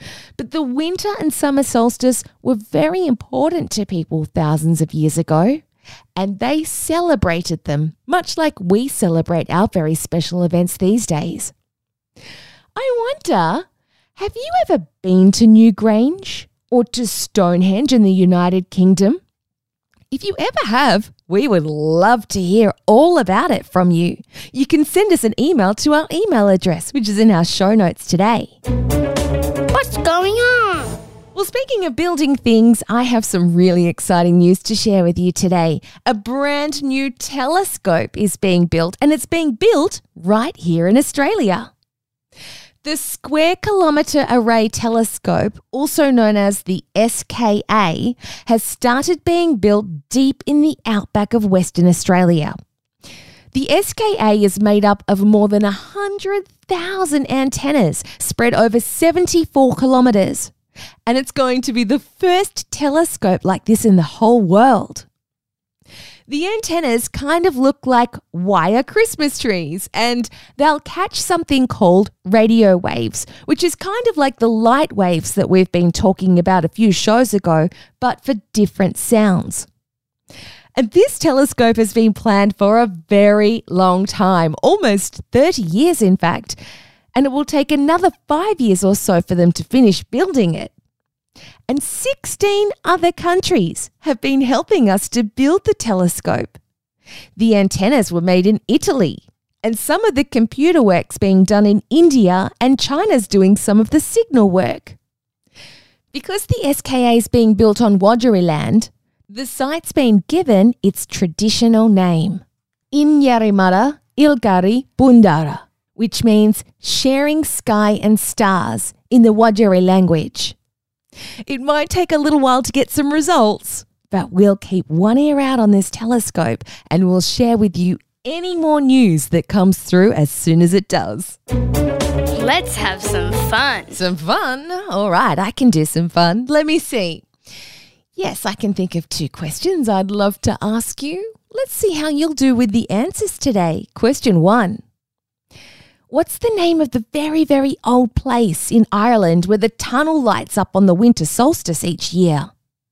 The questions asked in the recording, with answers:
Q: What's the name of the very, very old place in Ireland where the tunnel lights up on the winter solstice each year?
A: It's called Newgrange.